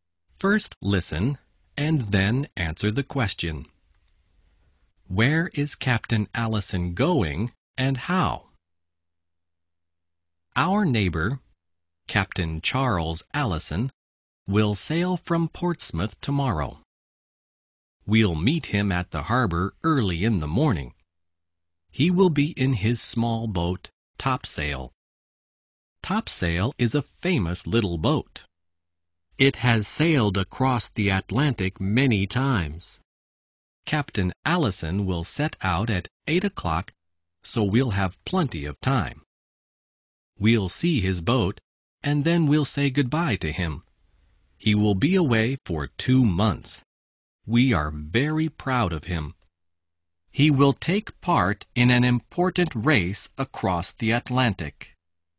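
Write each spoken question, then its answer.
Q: Where is Captain Allison going and how?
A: He is sailing across the Atlantic, in a race, in his small boat Topsail.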